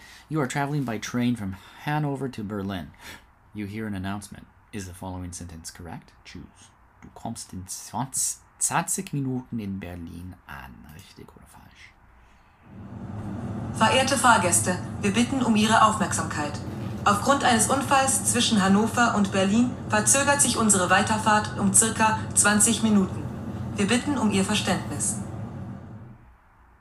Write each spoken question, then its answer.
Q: Du kommst in 20 Minuten in Berlin an.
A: It should have been falsch.